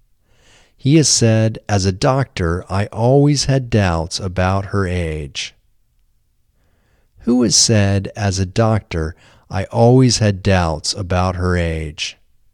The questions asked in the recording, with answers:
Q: Who has said, "As a doctor, I always had doubts about her age"?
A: Dr. Novoselov has said, "As a doctor, I always had doubts about her age."